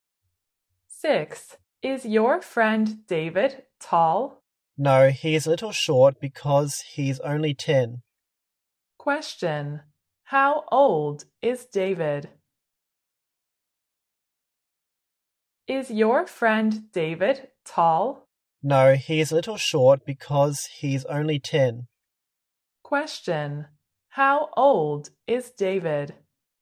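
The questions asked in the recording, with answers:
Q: How old is David?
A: 10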